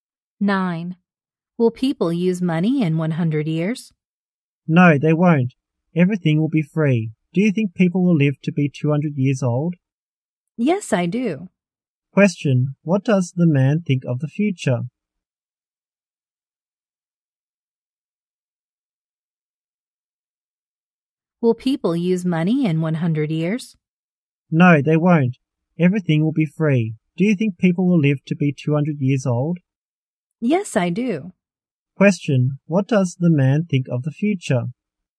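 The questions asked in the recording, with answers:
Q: Question, what does the man think of the future?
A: People won't use money and will live to be 200 years old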